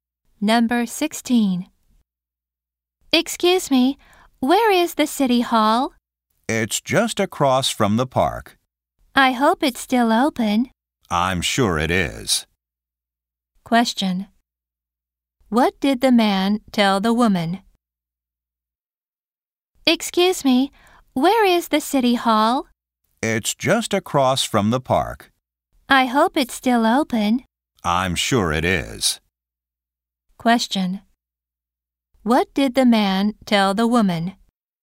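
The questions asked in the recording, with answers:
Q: What did the man tell the woman?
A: The city hall is across from the park.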